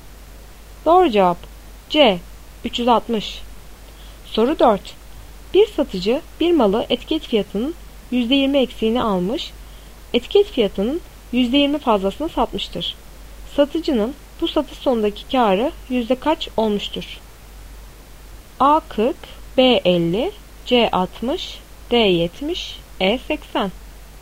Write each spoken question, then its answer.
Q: Satıcının bu satış sonundaki karı yüzde kaç olmuştur?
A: Doğru cevap B 50.